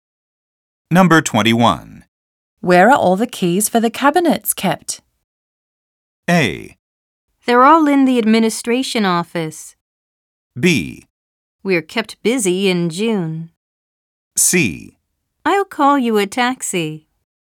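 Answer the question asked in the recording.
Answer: A: They're all in the administration office.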